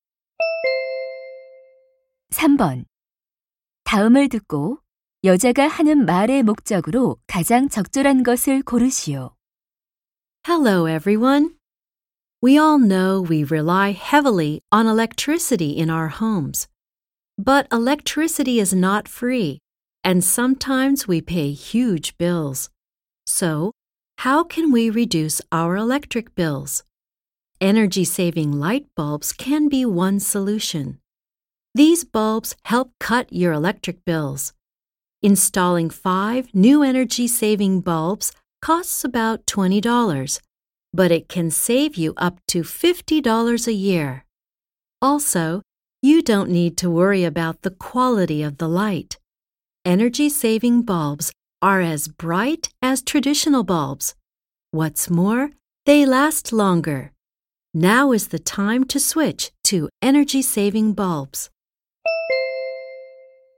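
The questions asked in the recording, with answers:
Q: 다음을 듣고 여자가 하는 말의 목적으로 가장 적절한 것을 고르시오.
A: 에너지 절약 전구로 바꾸도록 권장하려고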